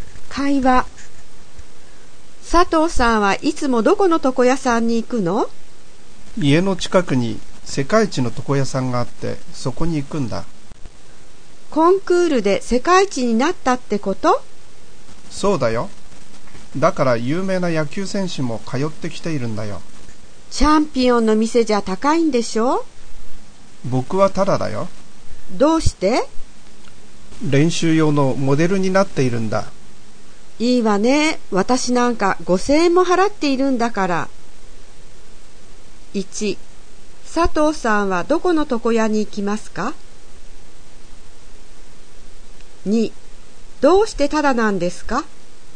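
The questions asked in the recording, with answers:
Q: 佐藤さんはどこの床屋に行きますか?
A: 家の近くの世界一の床屋さん

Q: どうしてタダなんですか?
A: 練習用のモデルになっているから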